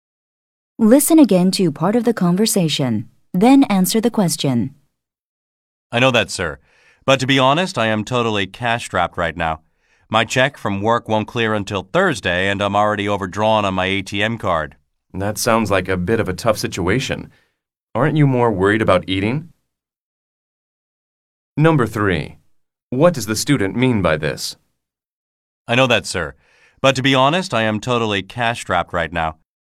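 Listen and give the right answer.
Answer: He has no money right now.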